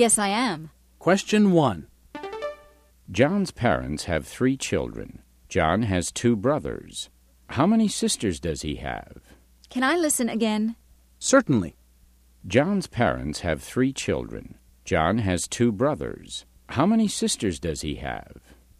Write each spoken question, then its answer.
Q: John's parents have 3 children. John has 2 brothers. How many sisters does he have?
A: The answer is, he doesn't have any sisters.